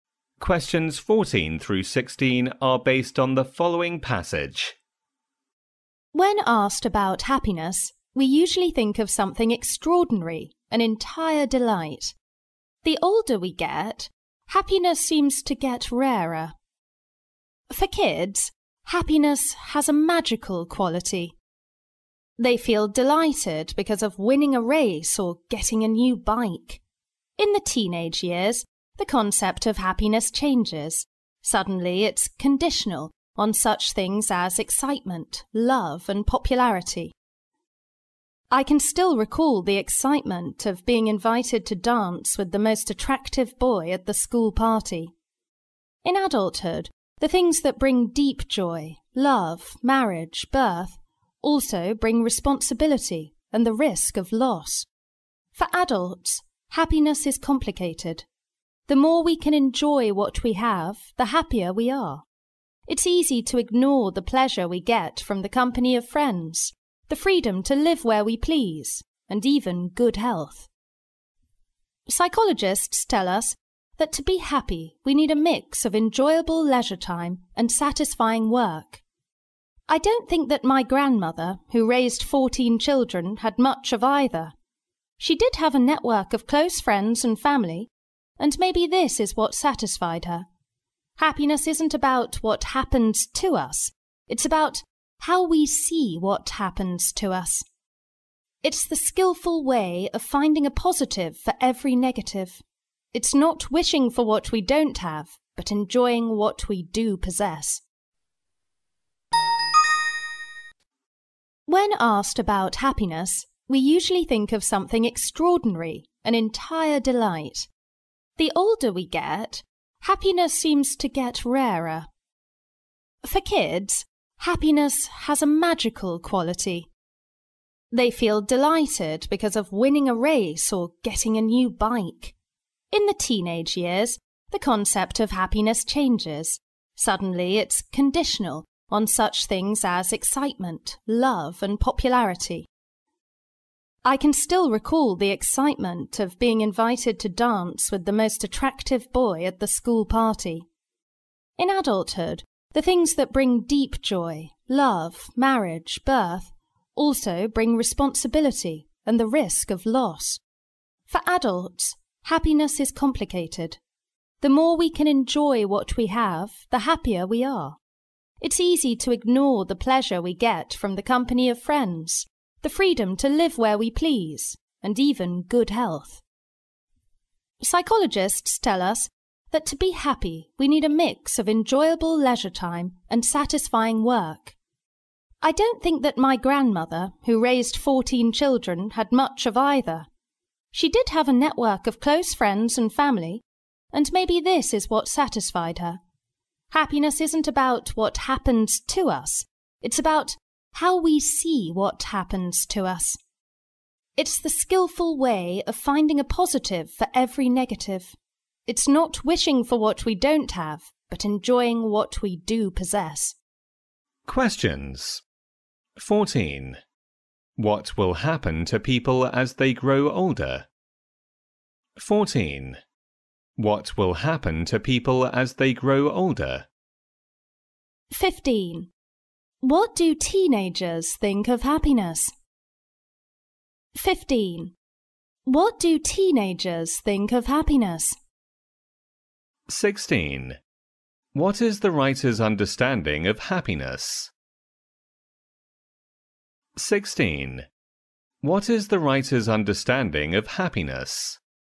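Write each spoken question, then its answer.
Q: What will happen to people as they grow older?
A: Happiness seems to get rarer

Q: What do teenagers think of happiness?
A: It depends on excitement, love and popularity

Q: What is the writer's understanding of happiness?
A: It's about how we see what happens to us; enjoying what we have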